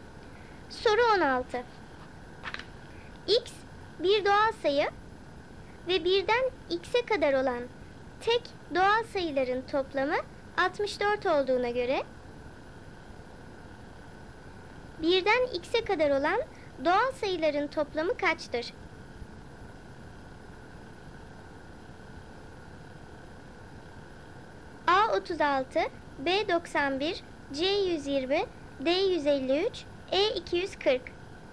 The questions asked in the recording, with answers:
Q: 1'den X'e kadar olan doğal sayıların toplamı kaçtır?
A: Doğru cevap C 120.